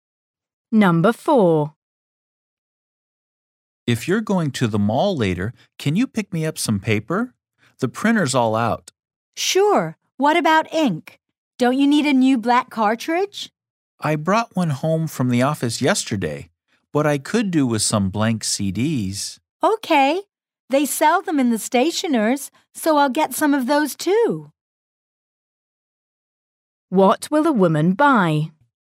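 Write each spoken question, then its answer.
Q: What will the woman buy?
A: paper and blank CDs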